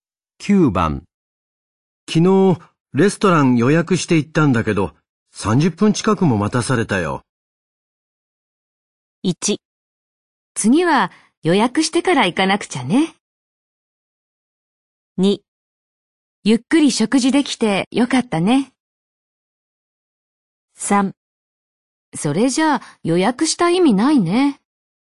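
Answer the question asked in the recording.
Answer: 3: それじゃあ予約した意味ないね。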